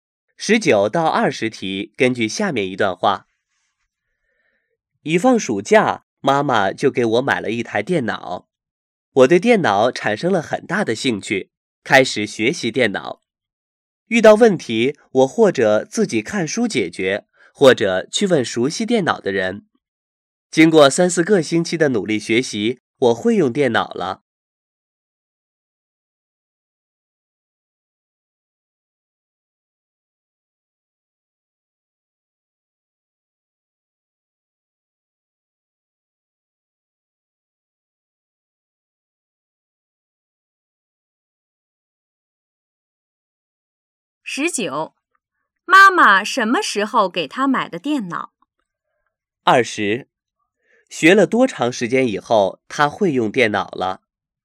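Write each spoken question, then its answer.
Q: 妈妈什么时候给她买的电脑?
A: 一放暑假

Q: 学了多长时间以后,她会用电脑了?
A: 三四个星期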